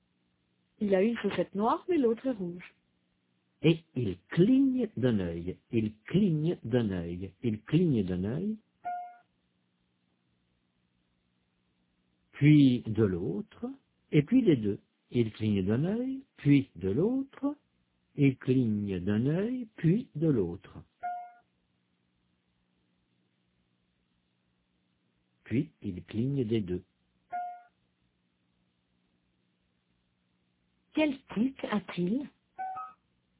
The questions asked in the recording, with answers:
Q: Quel tic a-t-il?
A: Il cligne d'un œil, puis de l'autre, puis des deux.